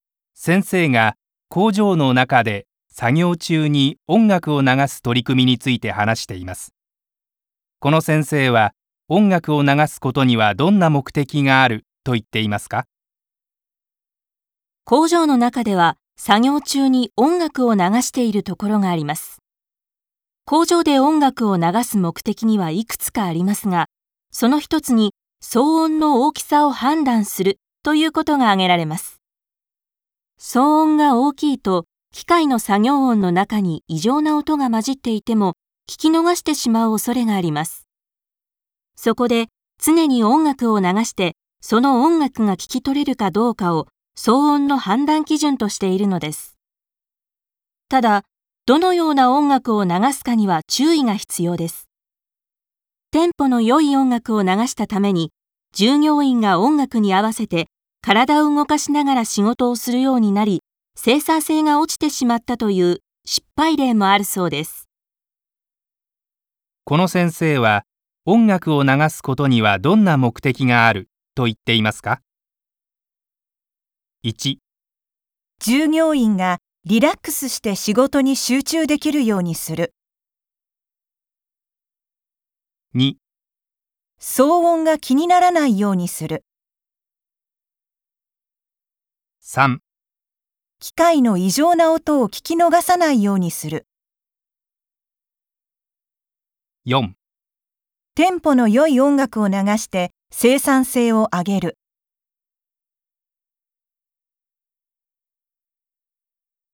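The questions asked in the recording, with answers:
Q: この先生は、音楽を流すことにはどんな目的があると言っていますか?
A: 3: 機械の異常な音を聞き逃さないようにする。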